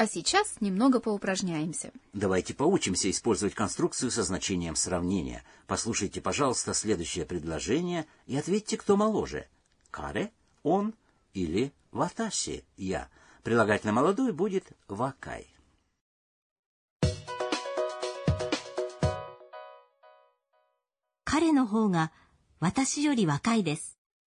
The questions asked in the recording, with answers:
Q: Послушайте, пожалуйста, следующее предложение и ответьте, кто моложе.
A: Правильный ответ – каре, он.